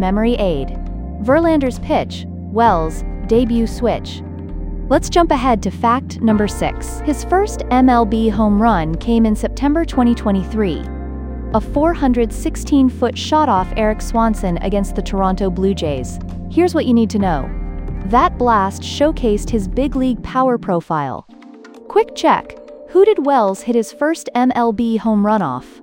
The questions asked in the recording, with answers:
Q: who did Wells hit his first MLB home run off?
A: Correct answer, Eric Swanson.